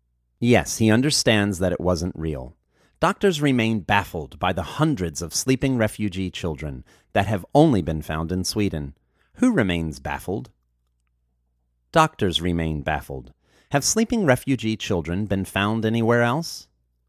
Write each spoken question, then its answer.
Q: Have sleeping refugee children been found anywhere else?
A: No, sleeping refugee children have not been found anywhere else.